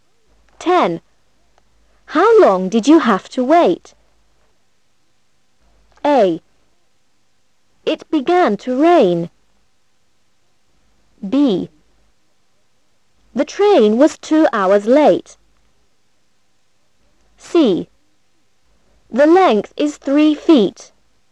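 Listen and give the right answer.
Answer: B: The train was 2 hours late.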